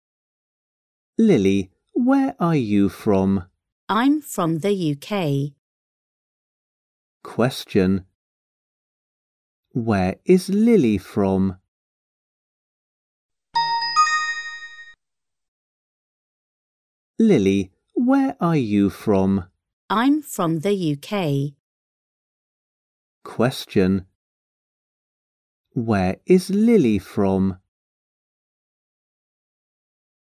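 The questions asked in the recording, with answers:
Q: Where is Lily from?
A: the UK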